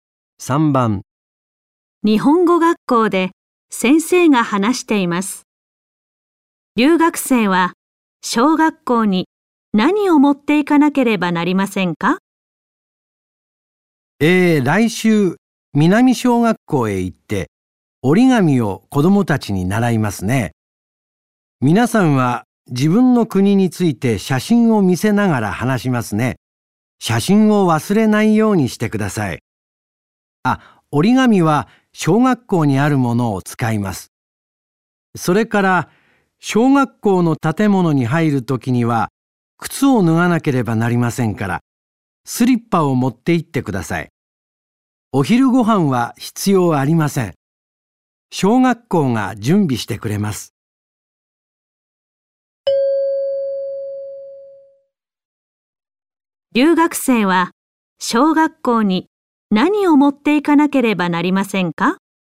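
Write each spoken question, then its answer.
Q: 留学生は小学校に何を持っていかなければなりませんか?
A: 写真とスリッパ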